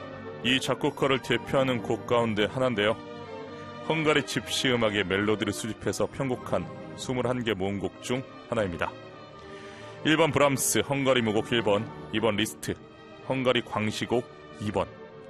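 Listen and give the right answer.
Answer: 1: 브람스 헝가리 무곡 1번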